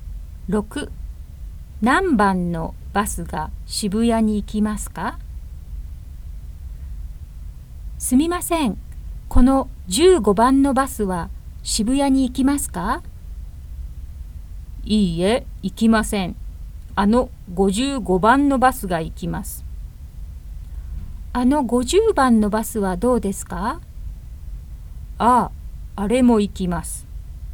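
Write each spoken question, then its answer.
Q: 何番のバスが渋谷に行きますか?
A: 55番と50番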